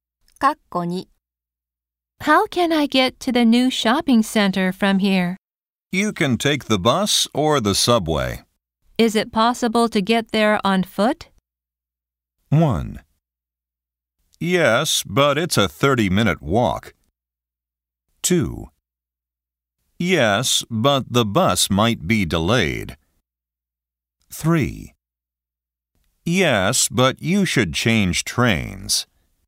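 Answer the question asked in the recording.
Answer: 1: Yes, but it's a 30-minute walk.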